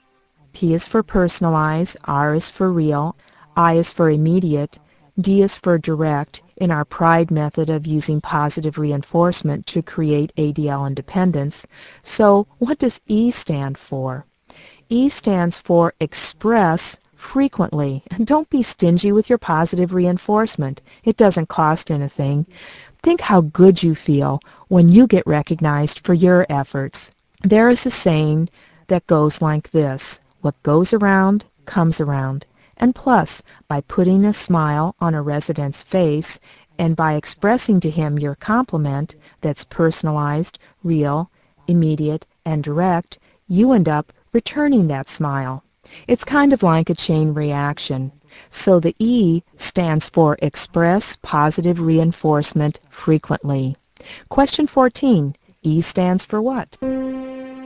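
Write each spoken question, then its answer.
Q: E stands for what?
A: Express frequently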